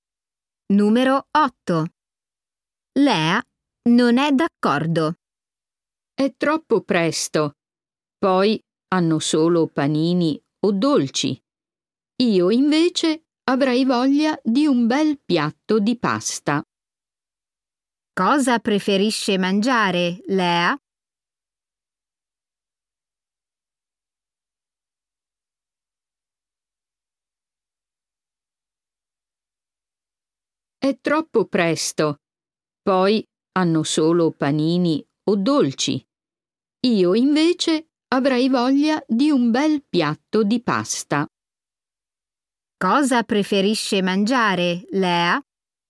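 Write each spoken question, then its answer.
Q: Cosa preferisce mangiare, Lea?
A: un piatto di pasta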